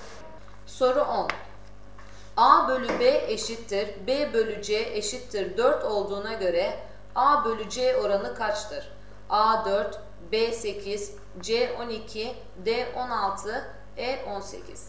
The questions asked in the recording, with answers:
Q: A bölü B eşittir B bölü C eşittir 4 olduğuna göre A bölü C oranı kaçtır?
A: Doğru cevap D 16.